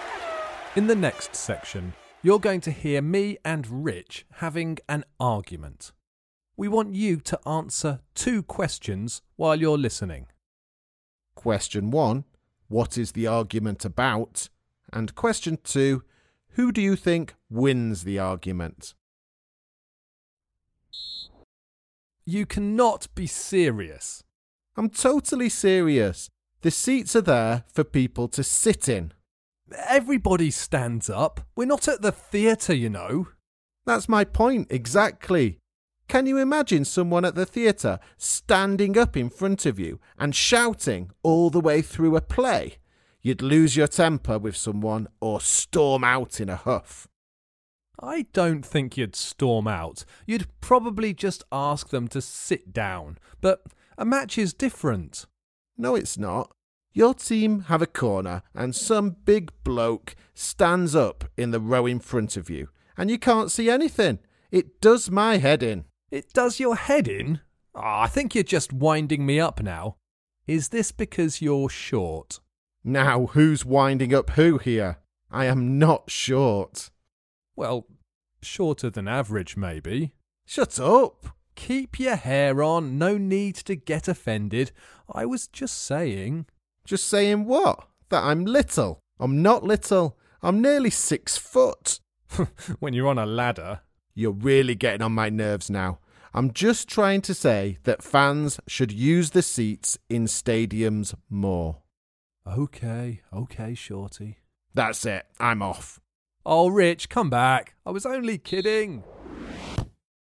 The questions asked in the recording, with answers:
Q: Question one, what is the argument about?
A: The argument was about whether football fans should be allowed to stand up at football matches.